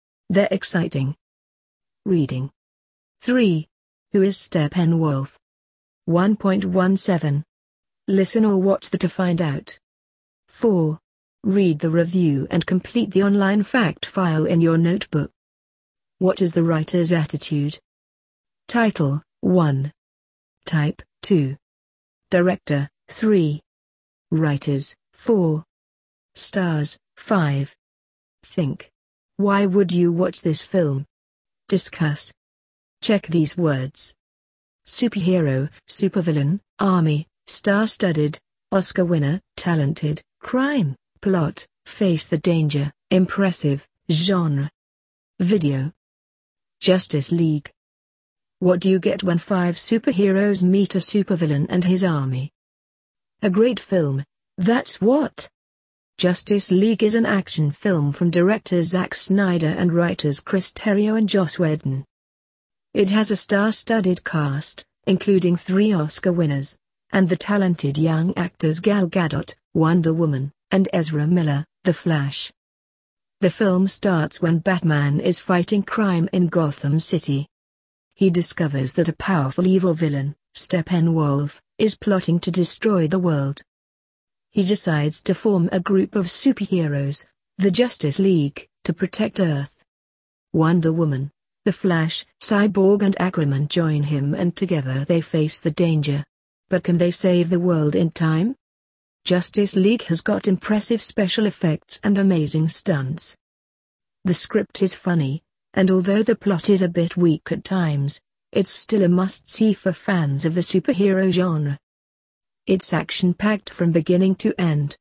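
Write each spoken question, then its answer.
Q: Who is Steppenwolf?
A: A powerful evil villain who is plotting to destroy the world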